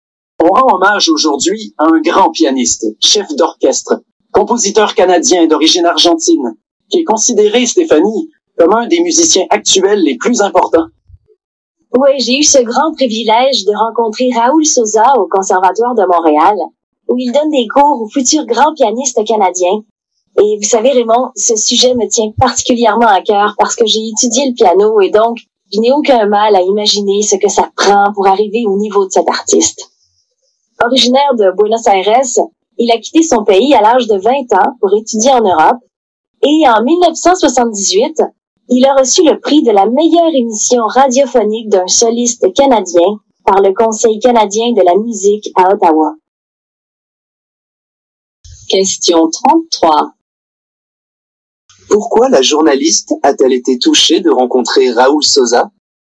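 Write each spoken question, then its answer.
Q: Pourquoi la journaliste a-t-elle été touchée de rencontrer Raoul Sosa?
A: Parce qu'elle a étudié le piano et sait ce qu'il faut pour arriver à son niveau.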